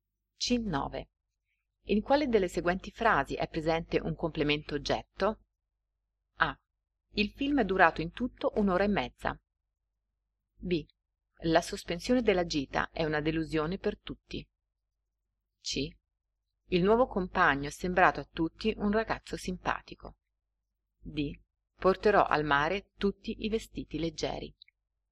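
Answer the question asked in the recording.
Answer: D: Porterò al mare tutti i vestiti leggeri.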